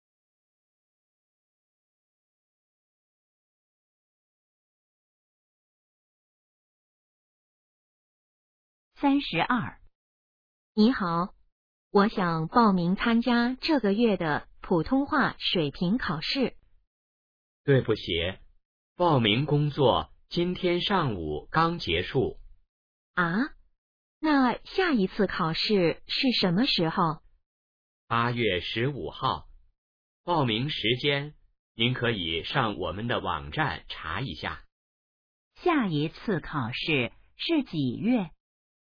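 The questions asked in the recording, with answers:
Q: 下一次考试是几月?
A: 8月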